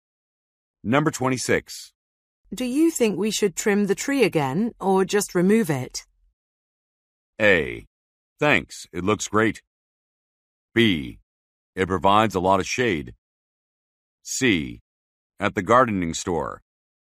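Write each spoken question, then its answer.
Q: Do you think we should trim the tree again or just remove it?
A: B: It provides a lot of shade.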